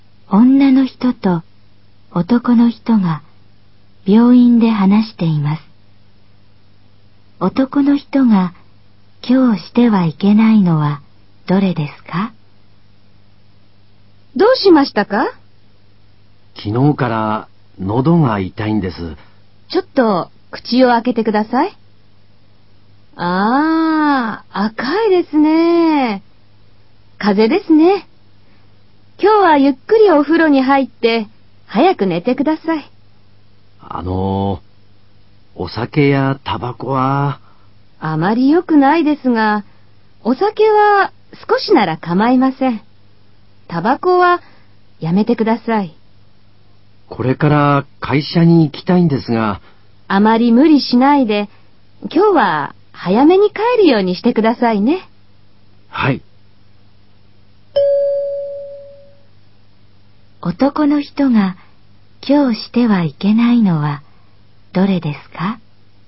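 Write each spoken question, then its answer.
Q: 男の人が今日してはいけないのはどれですか?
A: タバコを吸うこと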